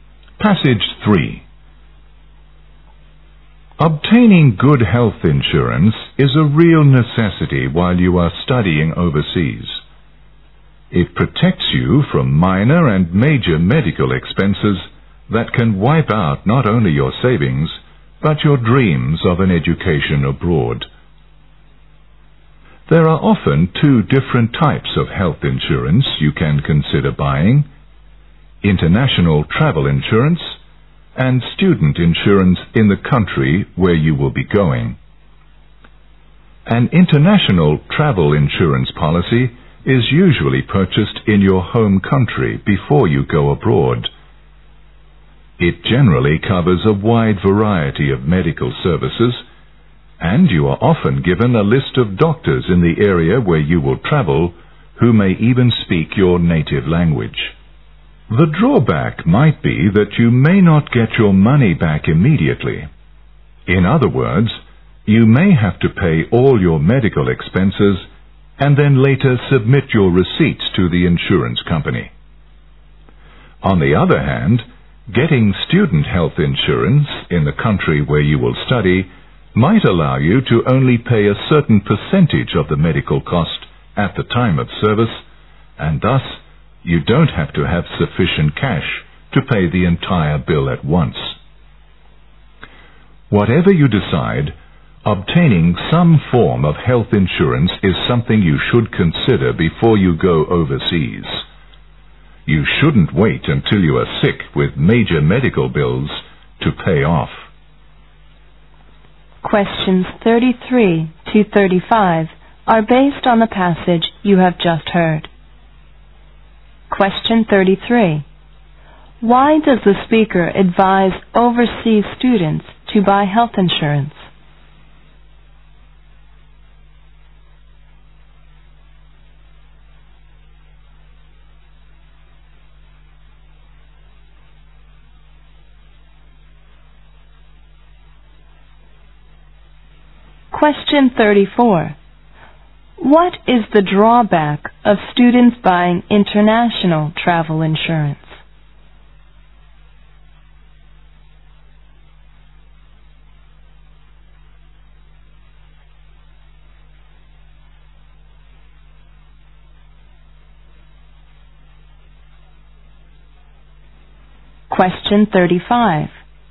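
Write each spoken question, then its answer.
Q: Why does the speaker advise overseas students to buy health insurance?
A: To protect them from medical expenses that could wipe out their savings

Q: What is the drawback of students buying international travel insurance?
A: They may not get their money back immediately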